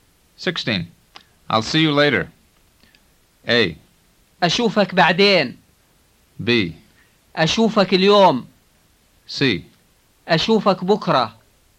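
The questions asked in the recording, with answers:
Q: I'll see you later.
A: A: أشوفك بعدين.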